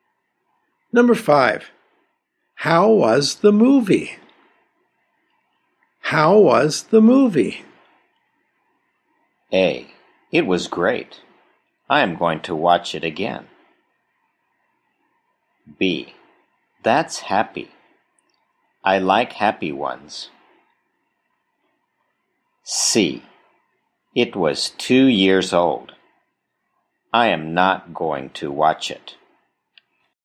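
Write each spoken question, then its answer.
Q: How was the movie?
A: A: It was great. I am going to watch it again.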